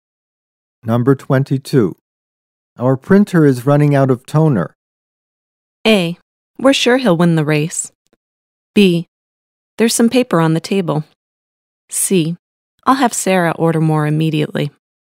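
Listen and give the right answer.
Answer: C: I'll have Sarah order more immediately.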